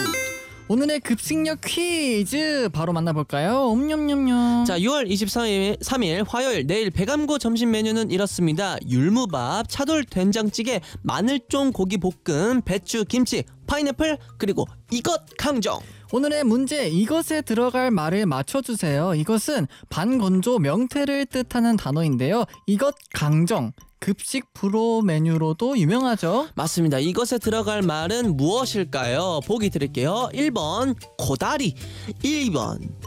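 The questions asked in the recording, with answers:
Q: 이것에 들어갈 말은 무엇일까요?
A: 1: 코다리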